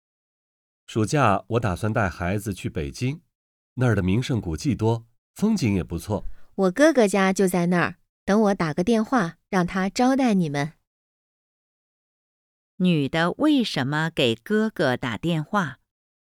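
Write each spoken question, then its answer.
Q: 女的为什么给哥哥打电话?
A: 让哥哥招待他们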